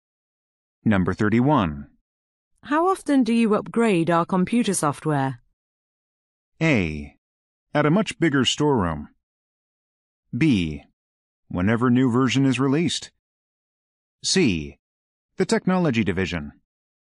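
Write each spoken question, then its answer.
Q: How often do you upgrade our computer software?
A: B: Whenever new version is released.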